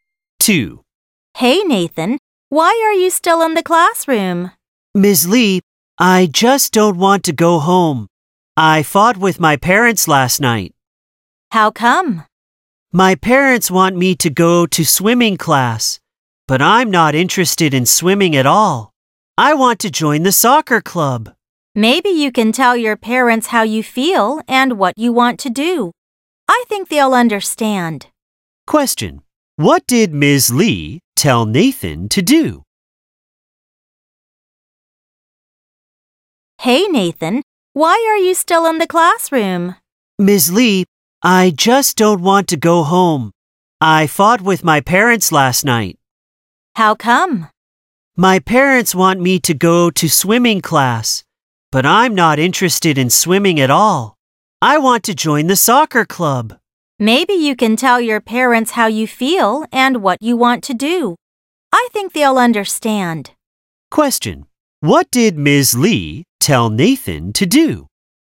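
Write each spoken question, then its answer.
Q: What did Ms. Lee tell Nathan to do?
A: Tell his parents how he feels and what he wants to do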